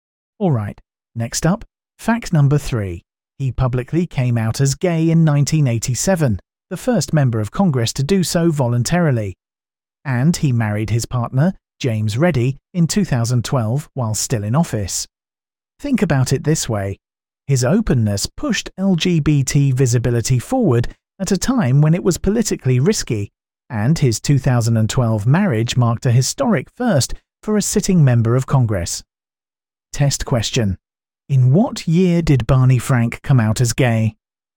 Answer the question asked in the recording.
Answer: 1987.